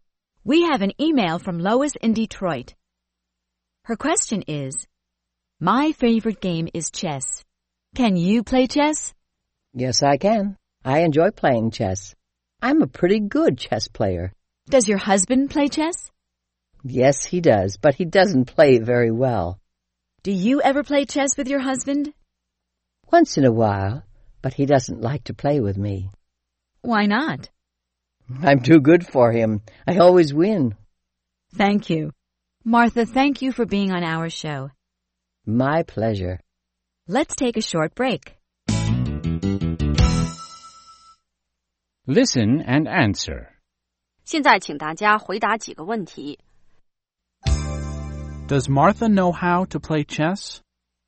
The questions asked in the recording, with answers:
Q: Does Martha know how to play chess?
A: Yes, she does.